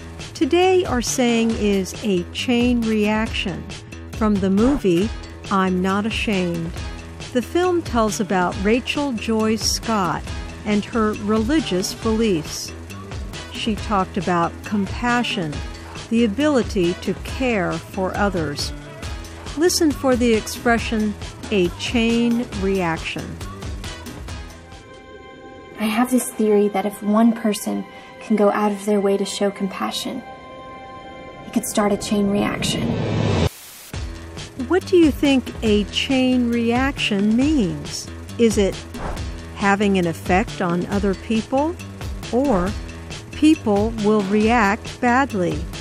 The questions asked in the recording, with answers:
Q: What do you think a chain reaction means?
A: A chain reaction means having an effect on other people.